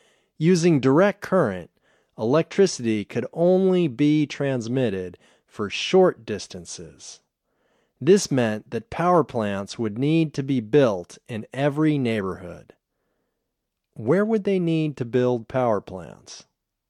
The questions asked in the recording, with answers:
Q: Where would they need to build power plants?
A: They would need to build power plants in every neighborhood.